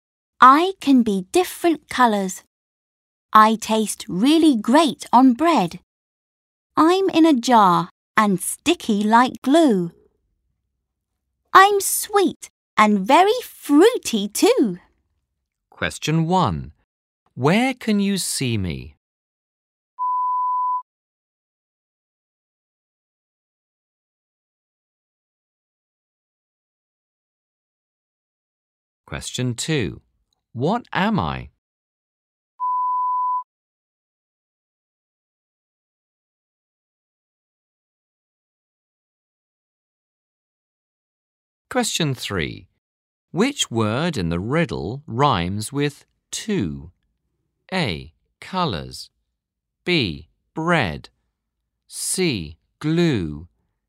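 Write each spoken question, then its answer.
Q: What am I?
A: jam

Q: Which word in the riddle rhymes with two?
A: C: Glue.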